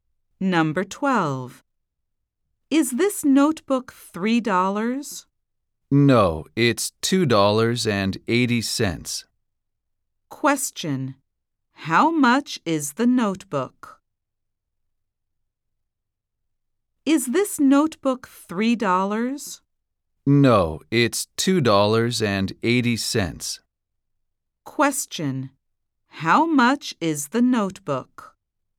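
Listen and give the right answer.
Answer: $2.80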